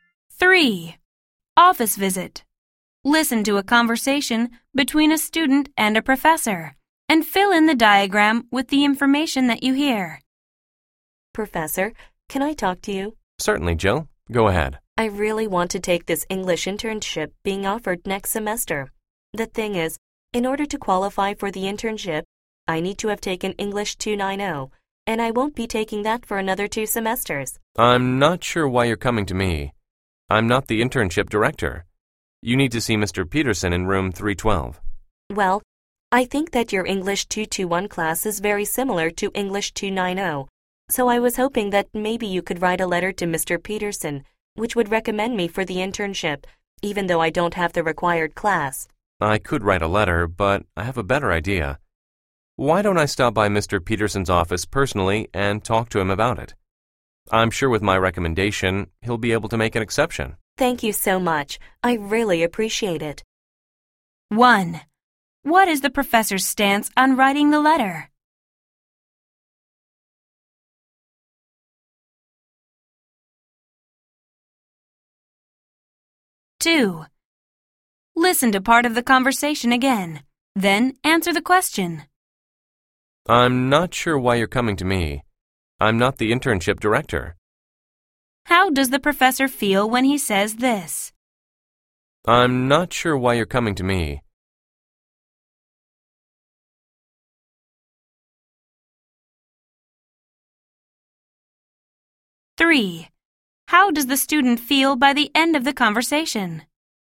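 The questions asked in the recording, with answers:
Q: What is the professor's stance on writing the letter?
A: He could write it, but he has a better idea: he'll talk to Mr. Peterson in person

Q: How does the student feel by the end of the conversation?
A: Grateful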